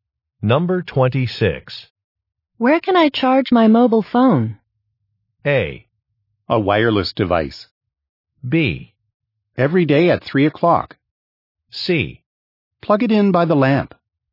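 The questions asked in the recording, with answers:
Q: Where can I charge my mobile phone?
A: C: Plug it in by the lamp.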